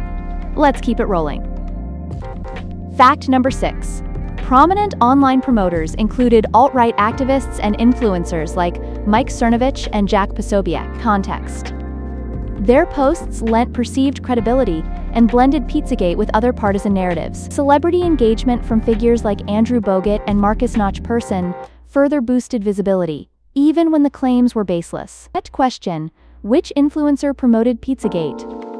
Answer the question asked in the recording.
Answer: Mike Cernovich